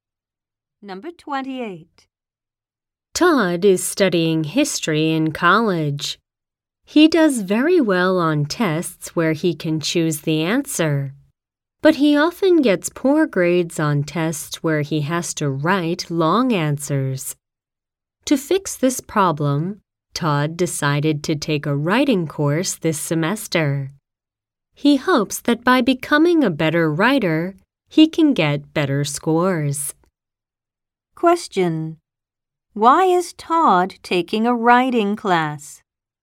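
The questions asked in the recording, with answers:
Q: Why is Todd taking a writing class?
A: To get better scores on tests that need long written answers.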